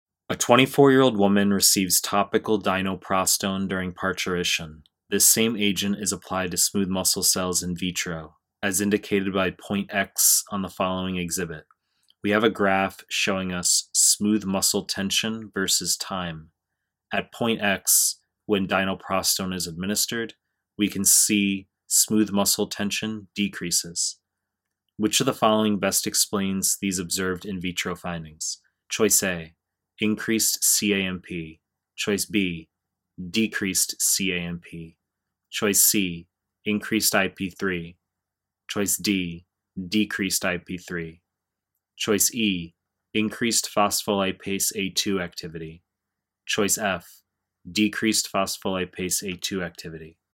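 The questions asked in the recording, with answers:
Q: Which of the following best explains these observed in vitro findings?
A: A: increased CAMP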